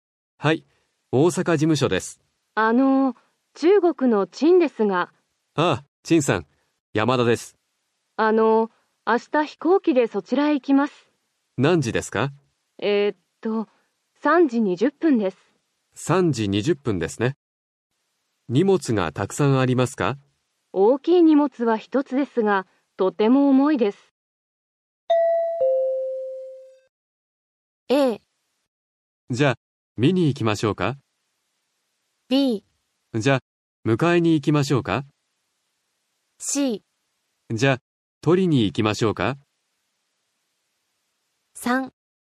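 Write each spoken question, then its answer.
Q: 大きい荷物は一つですが、とても重いです。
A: B: じゃあ迎えに行きましょうか。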